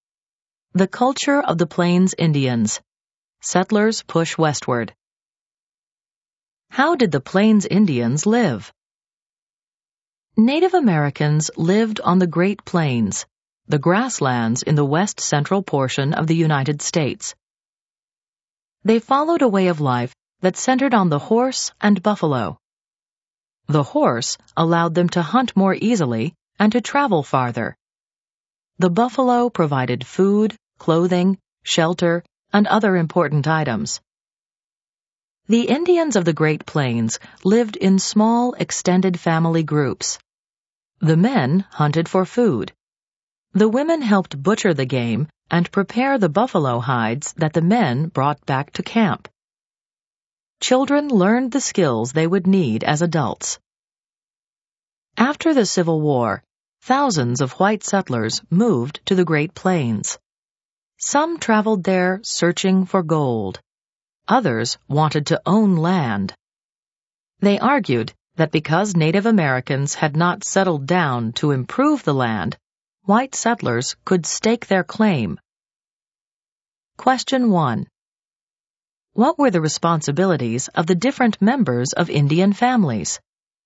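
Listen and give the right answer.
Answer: Men hunted for food; women butchered game and prepared buffalo hides; children learned the skills they would need as adults.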